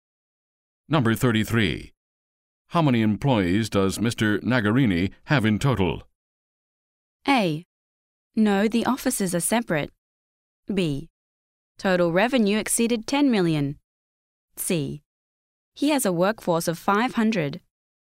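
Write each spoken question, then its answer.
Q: How many employees does Mr. Nagarini have in total?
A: C: He has a workforce of 500.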